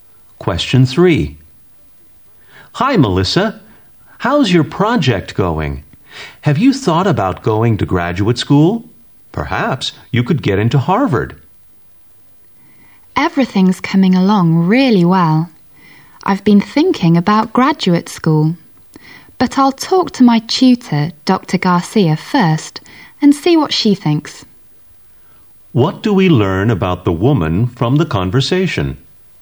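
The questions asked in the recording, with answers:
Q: What do we learn about the woman from the conversation?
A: She will consult her tutor, Dr. Garcia, about graduate school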